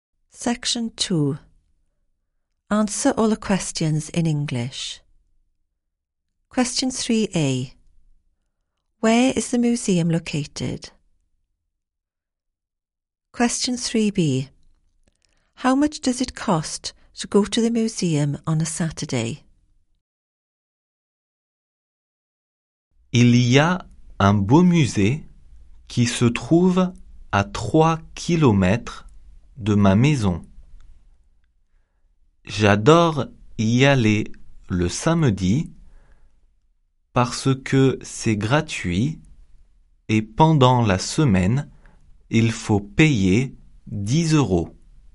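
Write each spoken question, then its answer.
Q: Where is the museum located?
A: 3 km from his house

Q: How much does it cost to go to the museum on a Saturday?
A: Nothing, it's free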